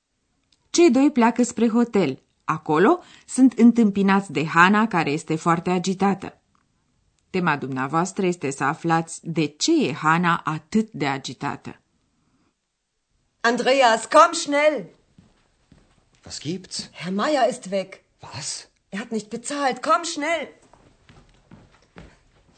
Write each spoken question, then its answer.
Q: Tema dumneavoastră este să aflați de ce e Hana atât de agitată.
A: Domnul Maier a plecat de la hotel fără să plătească.